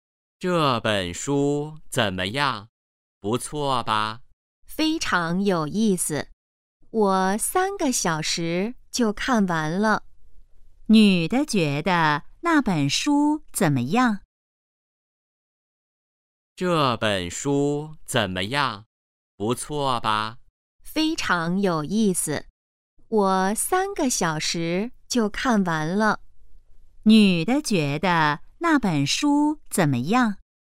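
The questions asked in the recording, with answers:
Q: 女的觉得那本书怎么样?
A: 非常有意思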